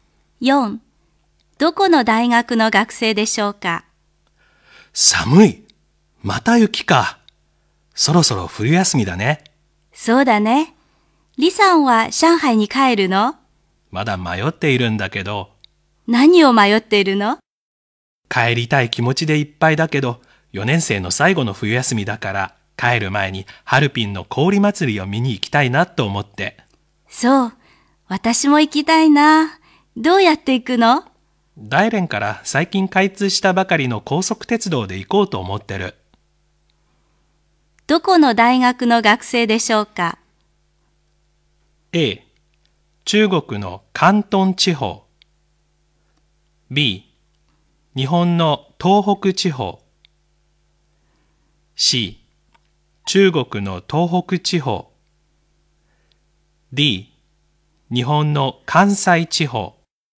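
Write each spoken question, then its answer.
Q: どこの大学の学生でしょうか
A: C: 中国の東北地方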